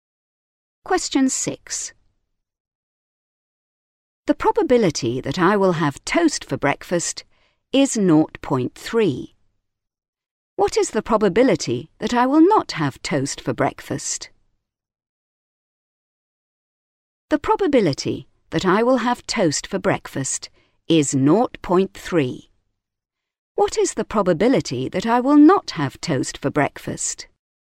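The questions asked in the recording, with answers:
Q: What is the probability that I will not have toast for breakfast?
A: 0.7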